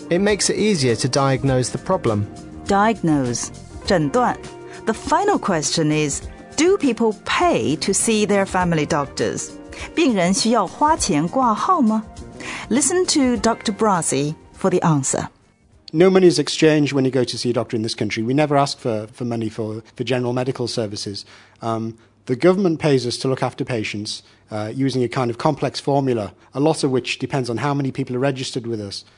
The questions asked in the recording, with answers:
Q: do people pay to see their family doctors?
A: So the answer is no, patients do not pay to see a doctor.